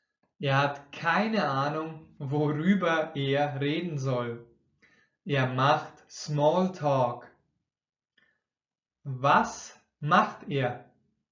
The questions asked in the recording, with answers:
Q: Was macht er?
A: Smalltalk. Er macht Smalltalk.